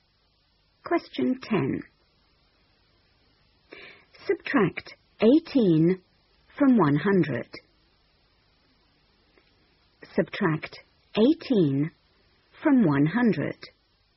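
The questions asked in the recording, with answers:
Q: Subtract 18 from 100.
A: 82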